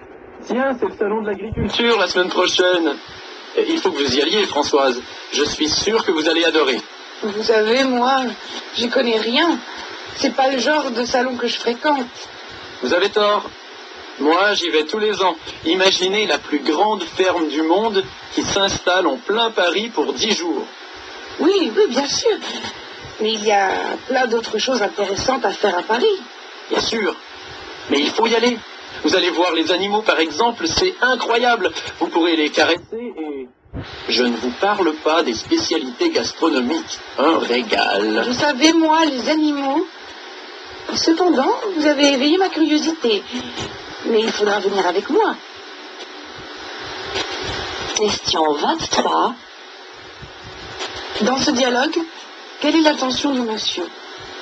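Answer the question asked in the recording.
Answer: Convaincre Françoise d'aller au salon de l'agriculture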